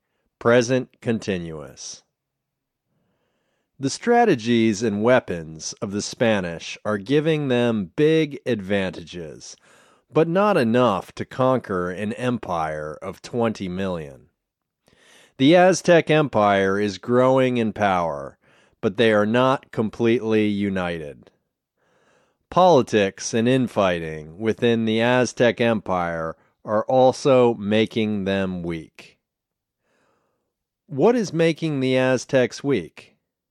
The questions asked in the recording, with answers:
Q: What is making the Aztecs weak?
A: Politics and infighting are making them weak.